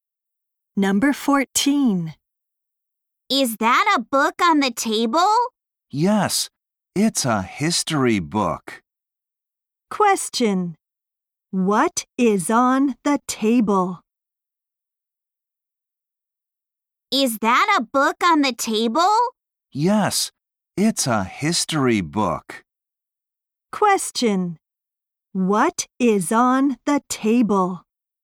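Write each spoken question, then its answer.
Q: What is on the table?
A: A history book.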